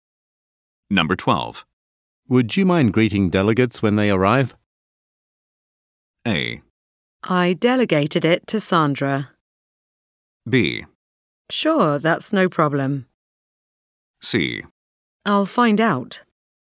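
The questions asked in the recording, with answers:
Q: Would you mind greeting delegates when they arrive?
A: B: Sure, that's no problem.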